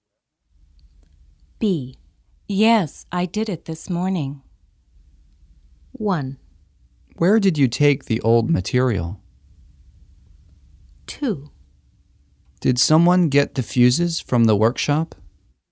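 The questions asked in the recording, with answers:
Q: Yes, I did it this morning.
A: 2: Did someone get the fuses from the workshop?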